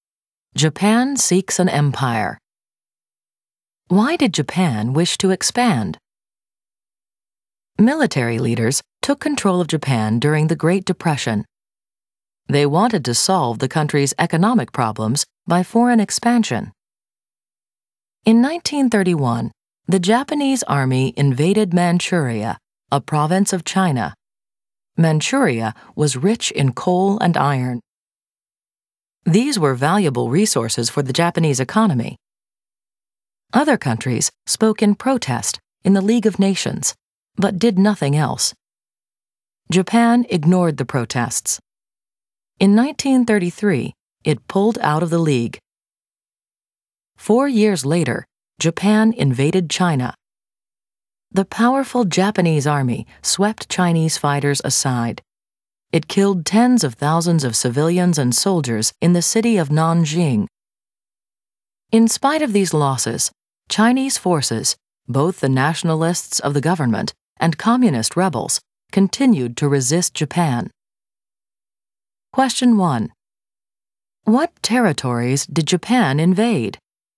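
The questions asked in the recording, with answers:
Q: What territories did Japan invade?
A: Manchuria and China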